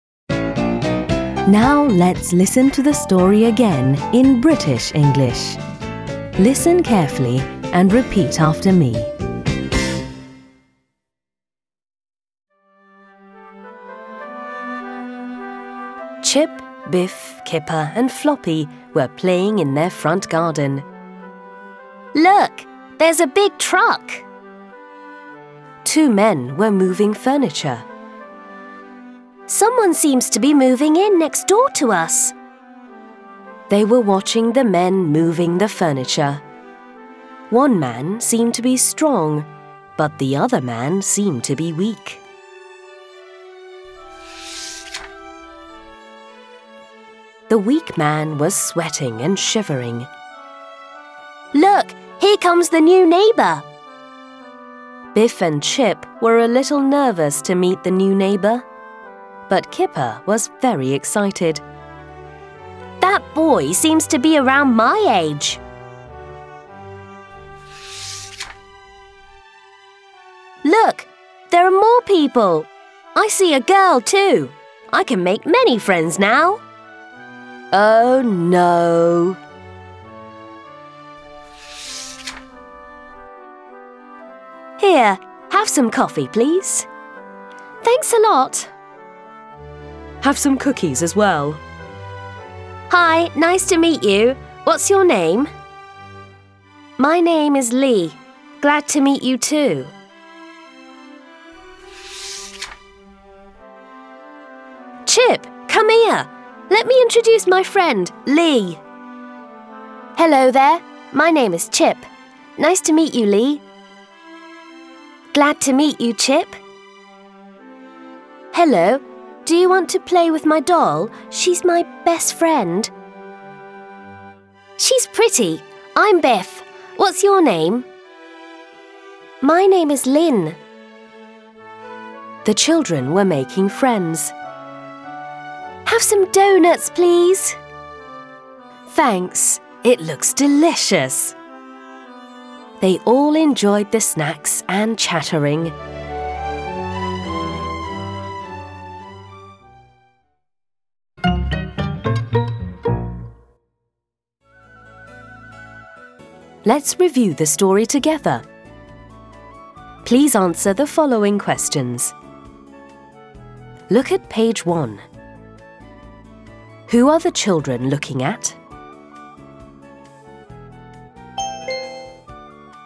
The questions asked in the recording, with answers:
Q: Who are the children looking at?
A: The children are looking at the two men moving furniture.